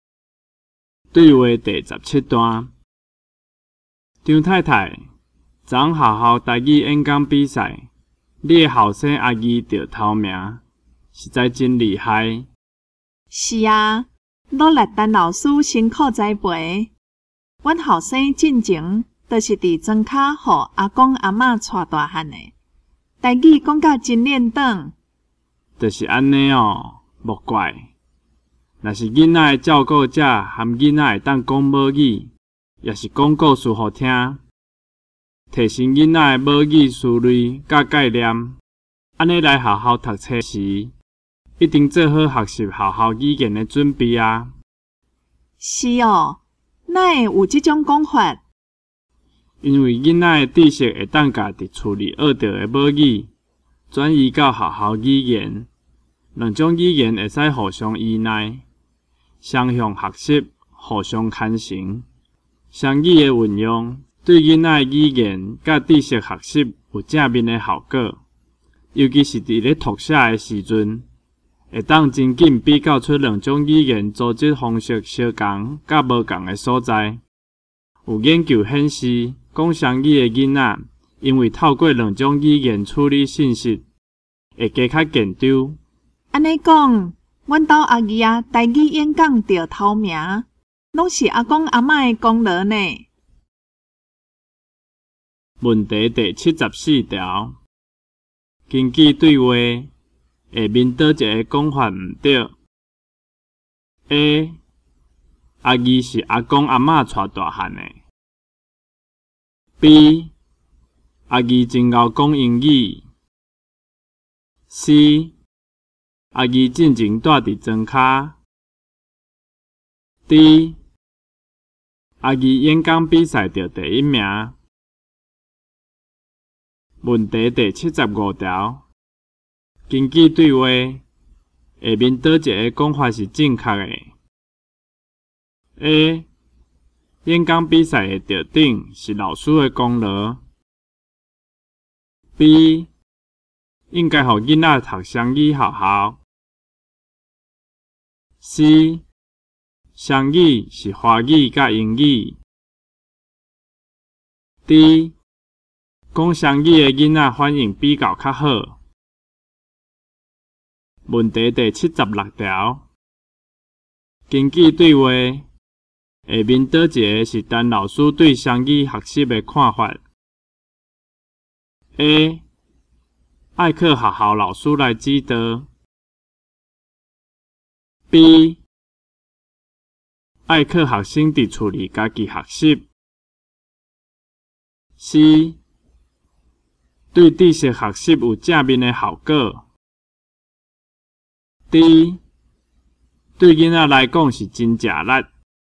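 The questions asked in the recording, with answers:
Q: 根据对话,下面倒一个讲法毋对。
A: B: 阿姨真会讲英语。

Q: 根据对话,下面倒一个讲法是正确的 ?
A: D: 讲双语的囡仔反应比较较好。

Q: 根据对话,下面倒一个是陈老师对双语学习的看法。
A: C: 对知识学习有正面的效果。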